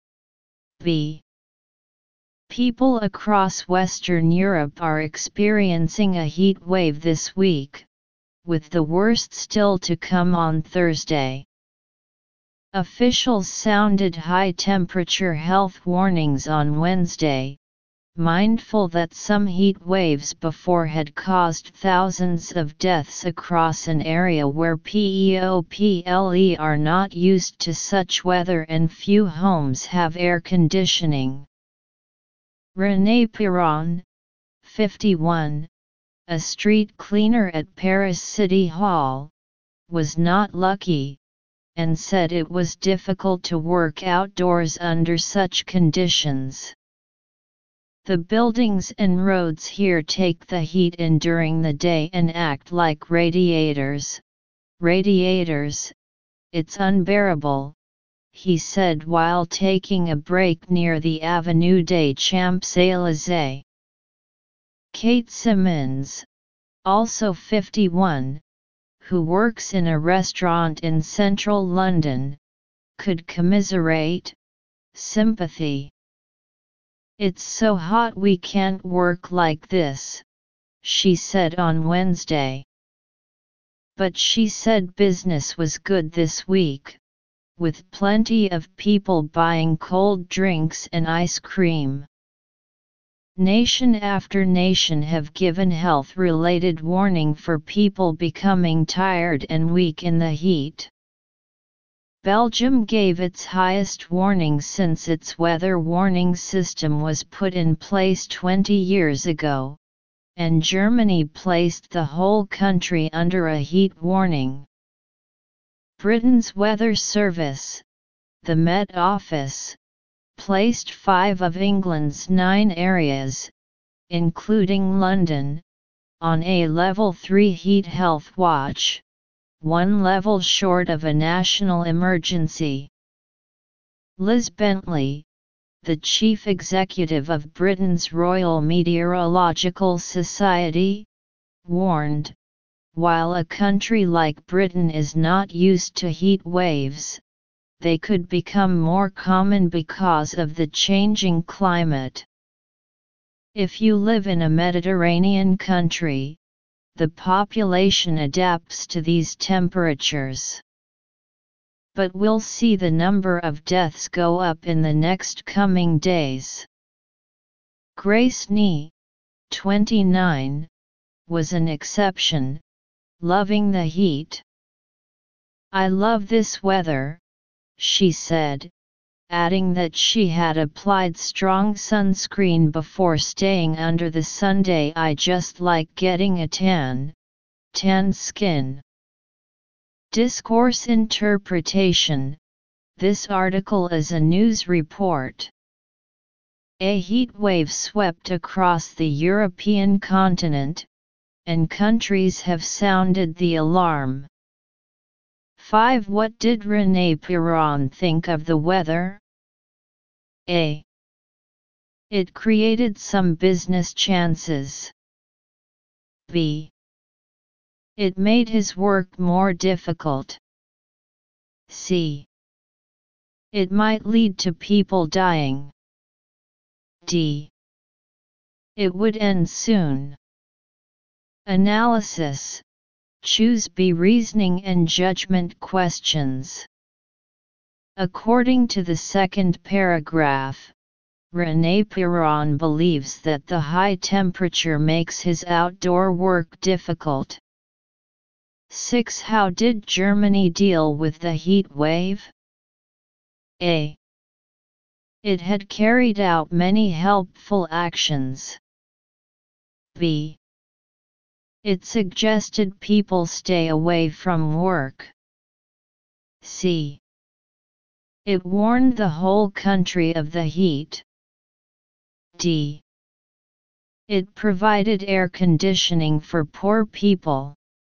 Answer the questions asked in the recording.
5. Choose B.
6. choose C